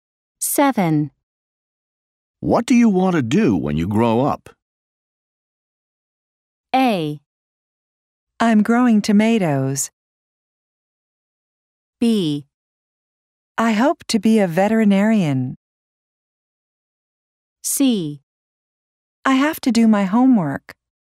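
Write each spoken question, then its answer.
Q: What do you want to do when you grow up?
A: B: I hope to be a veterinarian.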